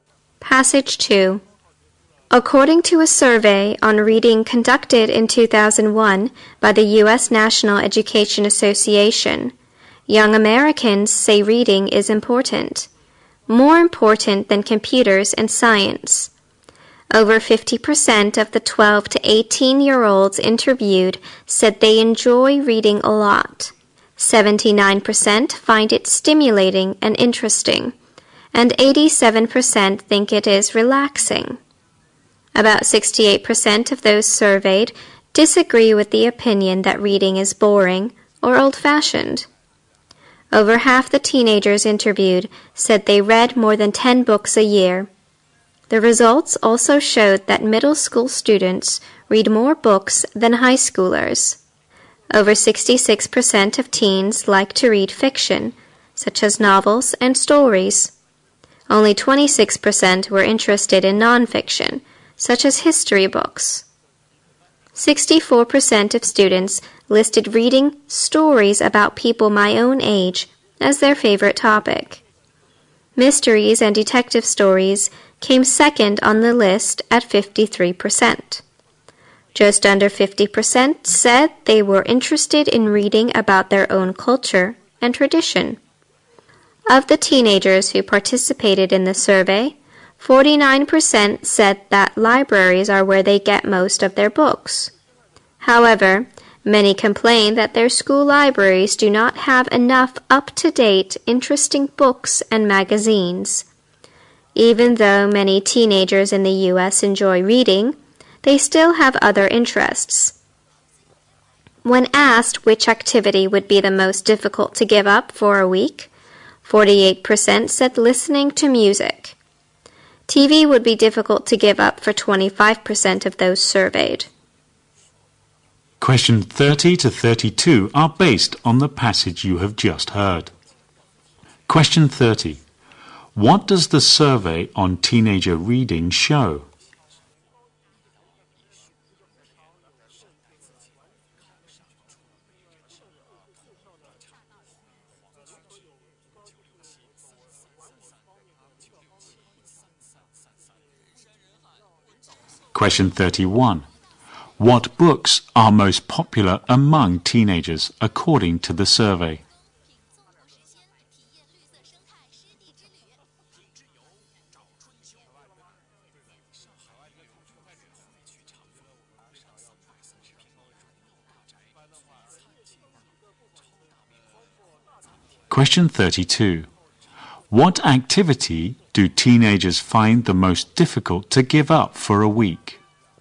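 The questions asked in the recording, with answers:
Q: What does the survey on teenager reading show?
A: Young Americans think reading is important and enjoy it.

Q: What books are most popular among teenagers according to the survey?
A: Fiction, especially stories about people their own age

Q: What activity do teenagers find the most difficult to give up for a week?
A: Listening to music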